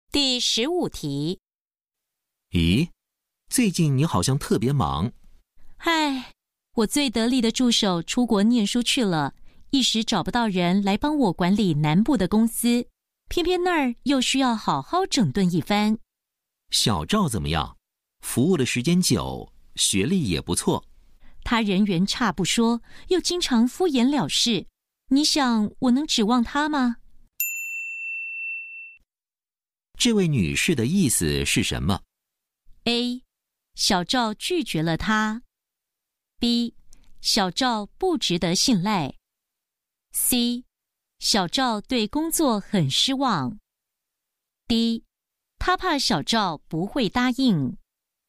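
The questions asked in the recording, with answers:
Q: 这位女士的意思是什么?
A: B: 小赵不值得信赖。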